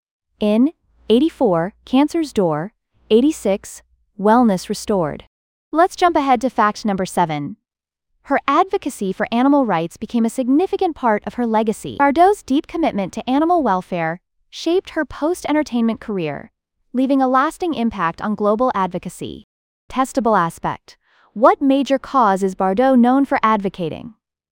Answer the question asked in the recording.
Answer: Correct answer. Animal rights.